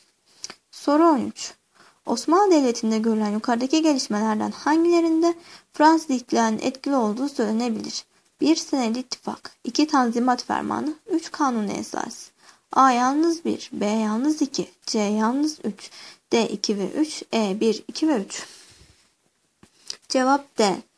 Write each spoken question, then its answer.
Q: Osmanlı Devleti'nde görülen yukarıdaki gelişmelerden hangilerinde Fransız İhtilali'nin etkili olduğu söylenebilir?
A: Cevap D.